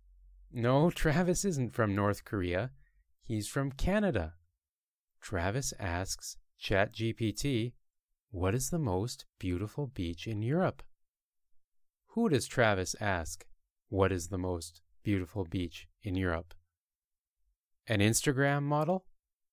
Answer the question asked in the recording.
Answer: He asks ChatGPT, a computer program.